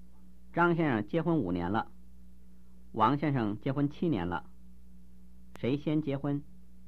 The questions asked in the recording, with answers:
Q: 谁先结婚?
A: 王先生先结婚。